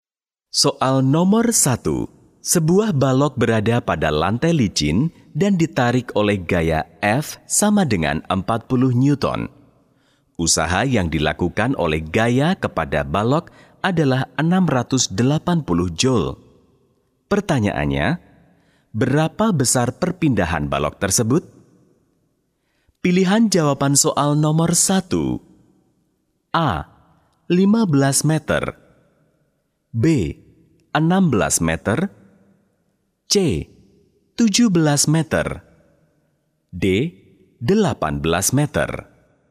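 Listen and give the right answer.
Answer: C: 17 meter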